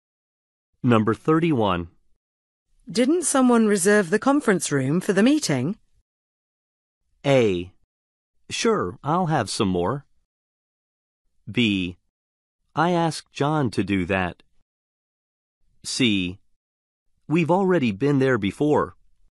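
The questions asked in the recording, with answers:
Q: Didn't someone reserve the conference room for the meeting?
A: B: I asked John to do that.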